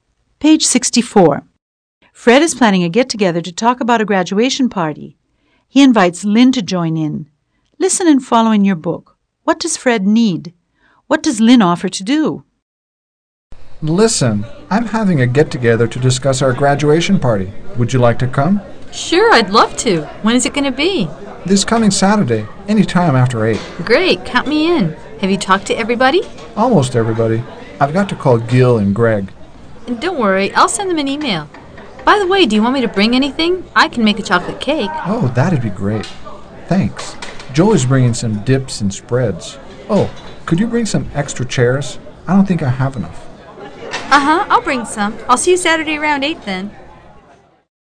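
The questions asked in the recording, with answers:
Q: What does Fred need?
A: Some extra chairs

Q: What does Lynn offer to do?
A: Make a chocolate cake (and email Gil and Greg)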